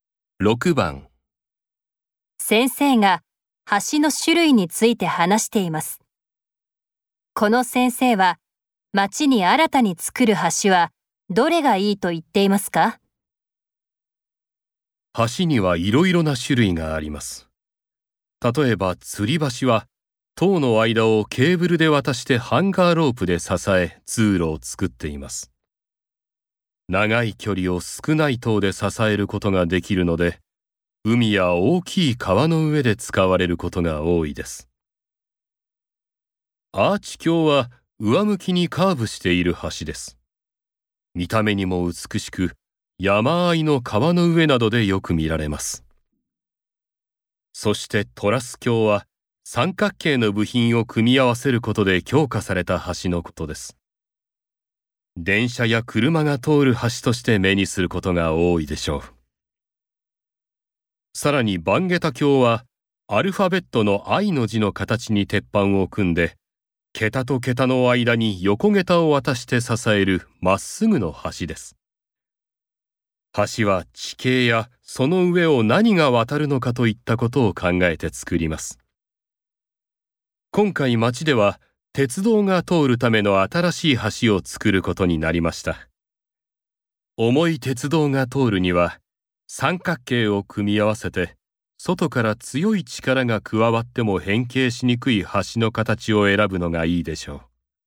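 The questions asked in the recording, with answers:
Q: この先生は町に新たに作る橋はどれがいいと言っていますか?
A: トラス橋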